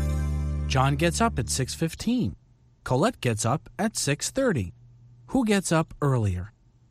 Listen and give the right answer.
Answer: John does. John gets up earlier than Colette.